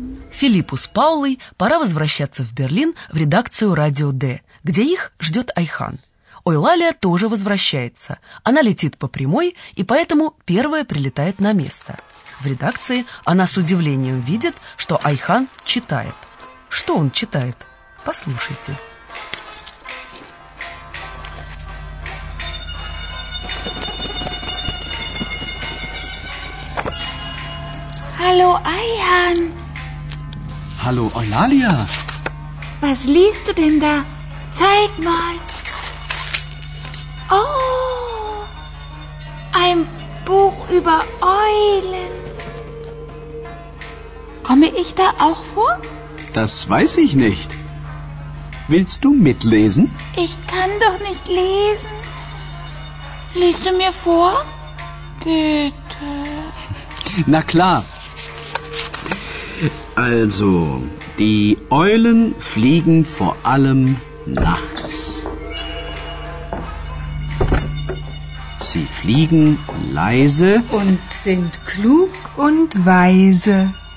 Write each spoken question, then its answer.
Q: Что он читает?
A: Айхан читает книгу о совах.